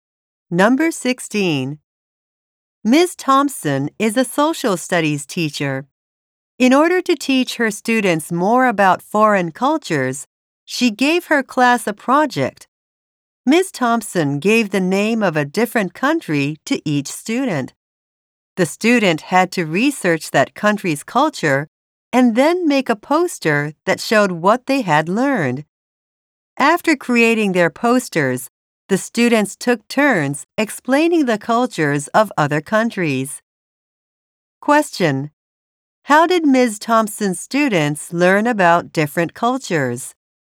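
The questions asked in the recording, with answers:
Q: How did Ms. Thompson's students learn about different cultures?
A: By researching a country's culture and making posters about it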